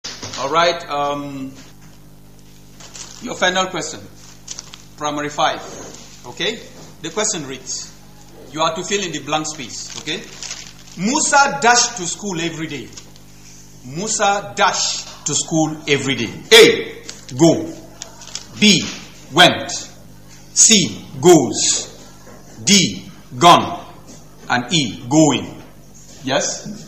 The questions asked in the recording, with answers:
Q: Musa dashed to school every day.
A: The answer is C, which is goes.